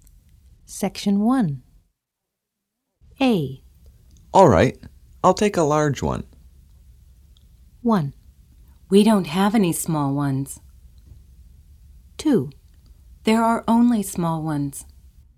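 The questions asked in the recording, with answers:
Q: All right, I'll take a large one.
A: 1: We don't have any small ones.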